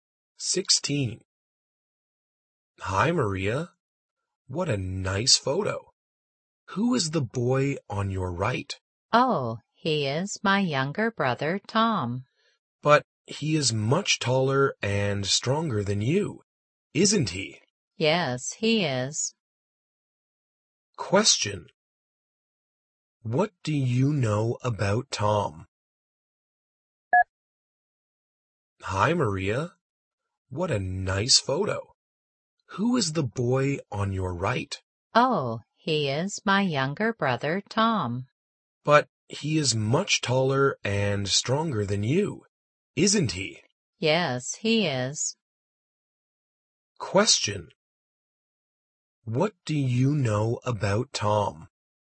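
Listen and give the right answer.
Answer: He is Maria's younger brother, taller and stronger than her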